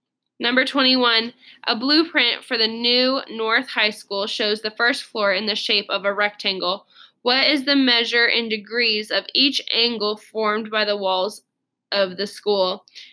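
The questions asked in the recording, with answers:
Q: What is the measure in degrees of each angle formed by the walls of the school?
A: 90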